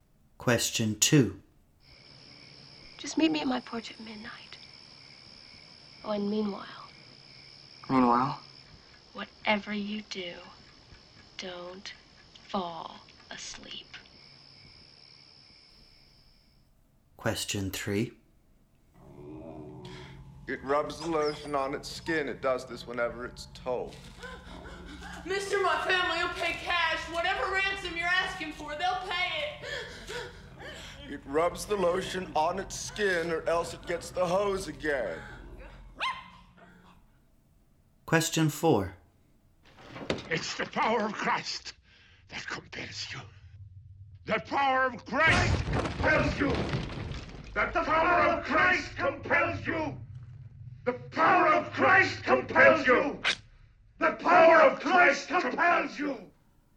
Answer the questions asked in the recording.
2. Question two Whatever you do, don't fall asleep came from Nightmare on Elm Street.
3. It puts the lotion on the skin, or else it gets the hose again, from The Silence of the Lambs.
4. Question four The power of Christ compels you, of course, from The Exorcist.